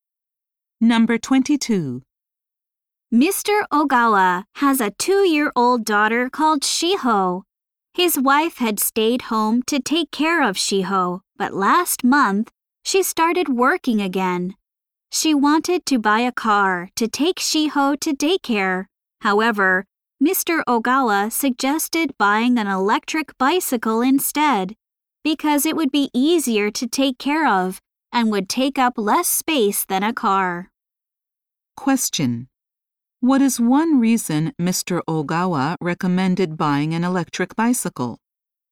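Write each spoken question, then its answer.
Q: what is one reason Mr. Ogawa recommended buying an electric bicycle?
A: It would be easier to take care of and take up less space than a car.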